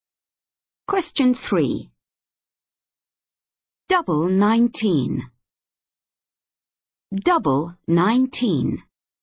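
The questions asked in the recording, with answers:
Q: Double 19.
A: 38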